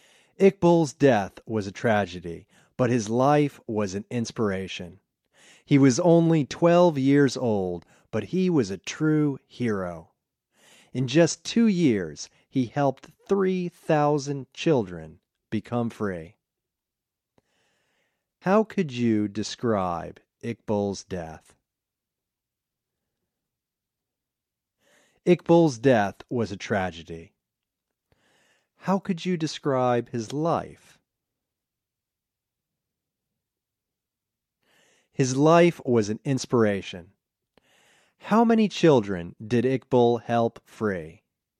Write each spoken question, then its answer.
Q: How could you describe Iqbal's death?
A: Iqbal's death was a tragedy.

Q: How could you describe his life?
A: His life was an inspiration.

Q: How many children did Iqbal help free?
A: He helped 3,000 children become free.